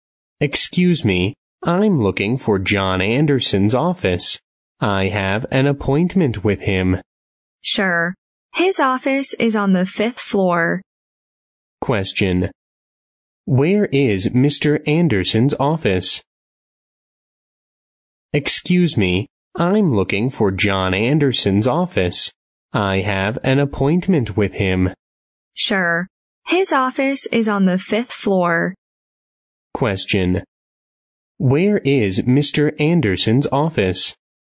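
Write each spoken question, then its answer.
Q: Where is Mr. Anderson's office?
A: On the 5th floor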